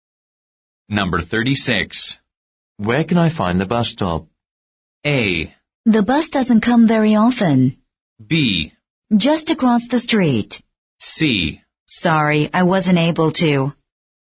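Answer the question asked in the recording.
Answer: B: Just across the street.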